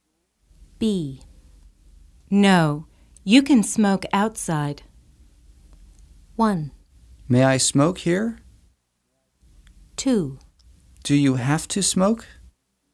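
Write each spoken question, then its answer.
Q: No, you can smoke outside.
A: 1: May I smoke here?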